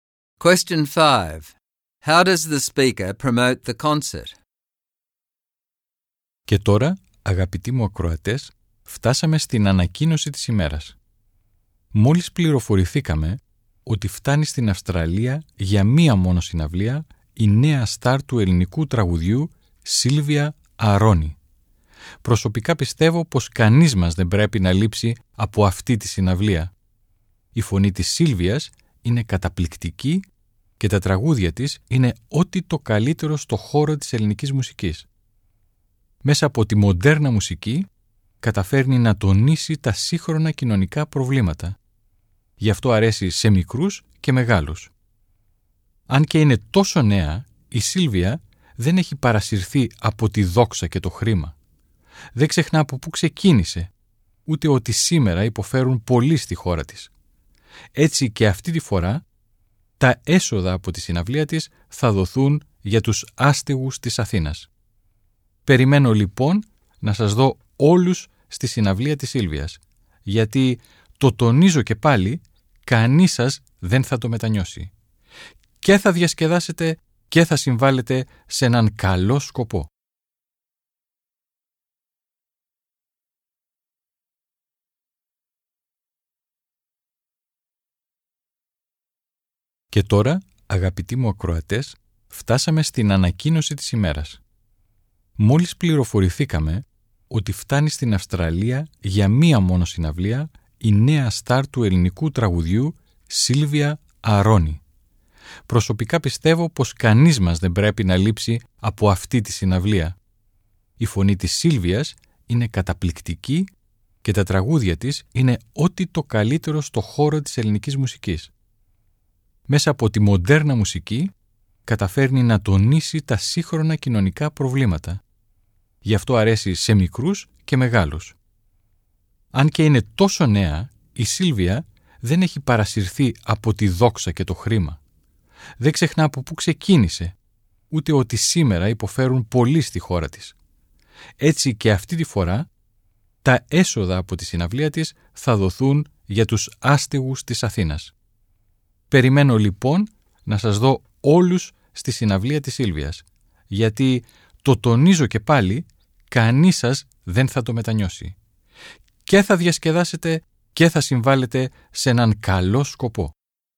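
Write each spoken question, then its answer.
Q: How does the speaker promote the concert?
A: He praises Silvia's amazing voice and her songs, which are the best in Greek music. He says her modern music highlights social problems and appeals to young and old, and that she stays humble. He adds that the proceeds go to Athens' homeless, so people will have fun and help a good cause, and no one will regret going.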